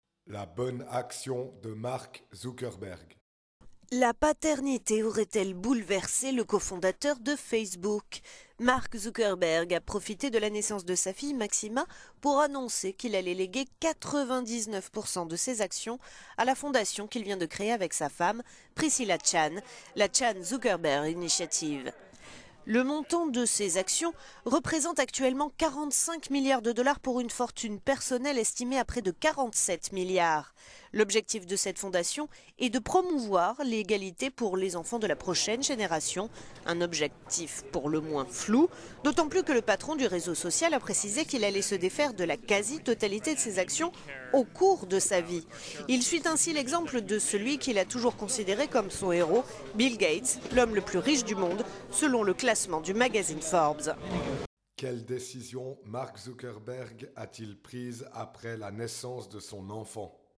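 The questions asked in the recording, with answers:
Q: Quelle décision Mark Zuckerberg a-t-il prise après la naissance de son enfant ?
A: Léguer 99 % de ses actions à sa fondation, la Chan Zuckerberg Initiative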